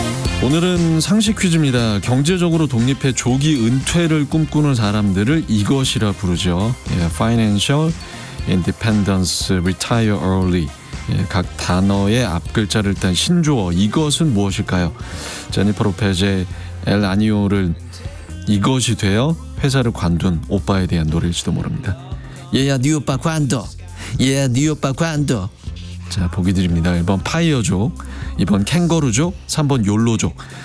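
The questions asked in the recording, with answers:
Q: 예, 각 단어의 앞글자를 딴 신조어 이것은 무엇일까요?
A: 1: 파이어족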